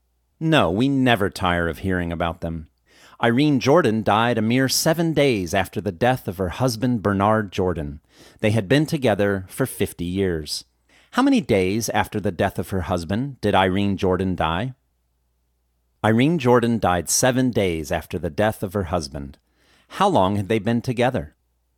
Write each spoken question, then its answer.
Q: How long had they been together?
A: They had been together for 50 years.